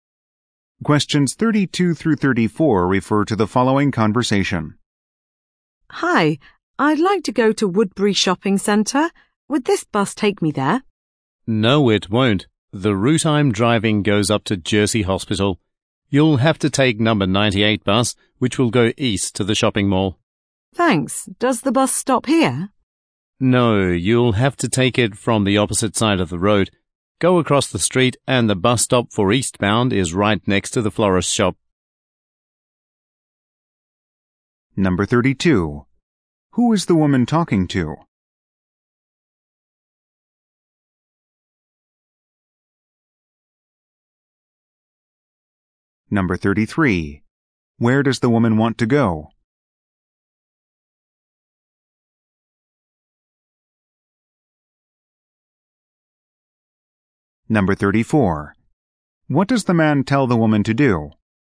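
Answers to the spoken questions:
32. A bus driver
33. Woodbury Shopping Center
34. Cross the street and take the number 98 bus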